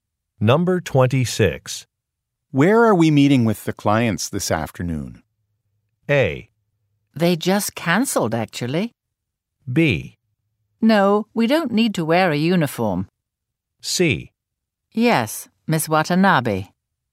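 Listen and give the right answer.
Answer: A: They just cancelled, actually.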